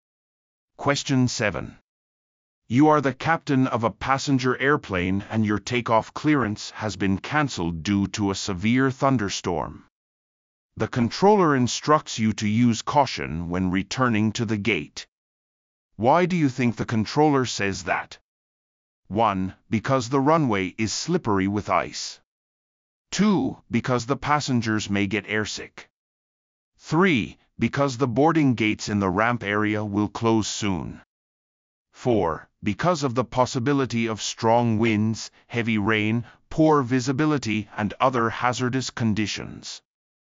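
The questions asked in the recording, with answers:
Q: Why do you think the controller says that?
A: 4: Because of the possibility of strong winds, heavy rain, poor visibility, and other hazardous conditions.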